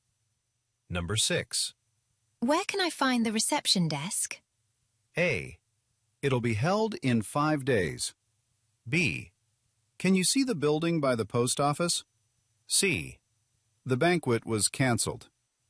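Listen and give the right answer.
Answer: B: Can you see the building by the post office?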